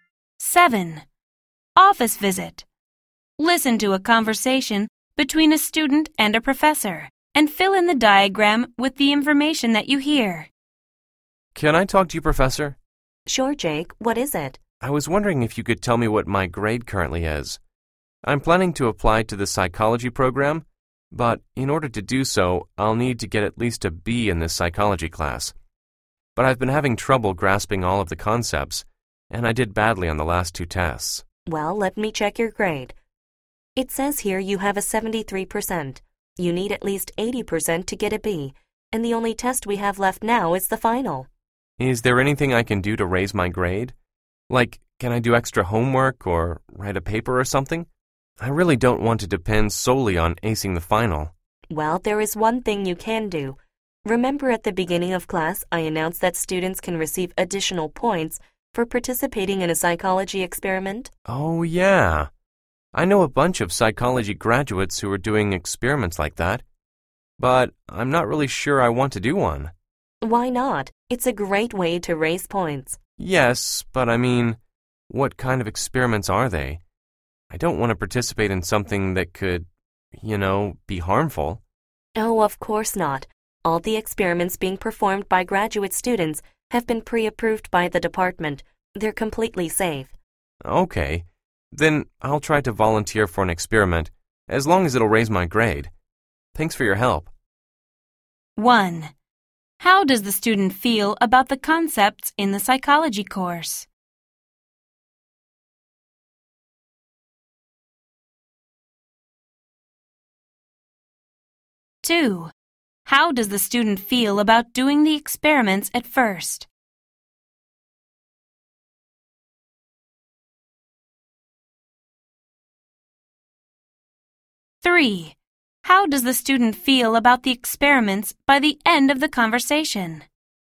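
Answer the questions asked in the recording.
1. He has trouble grasping them; they are difficult for him
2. Unsure; worried they could be harmful
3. Willing to volunteer since they are safe and will raise his grade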